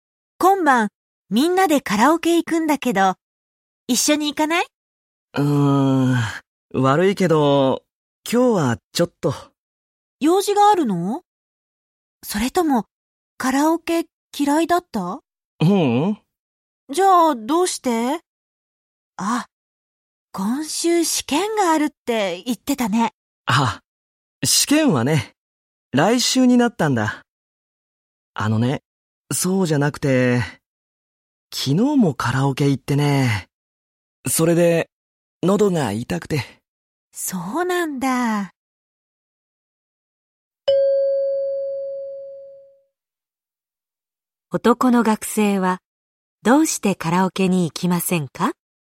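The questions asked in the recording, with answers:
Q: 男の学生は、どうしてカラオケに行きませんか?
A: 喉が痛いから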